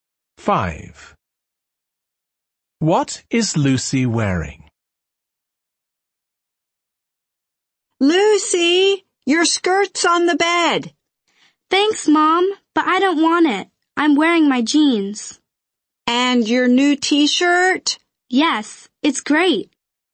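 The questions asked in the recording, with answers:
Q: What is Lucy wearing?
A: Her jeans and her new T-shirt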